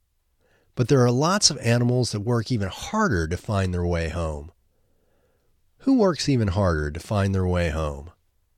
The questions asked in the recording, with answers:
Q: Who works even harder to find their way home?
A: Lots of animals work even harder to find their way home.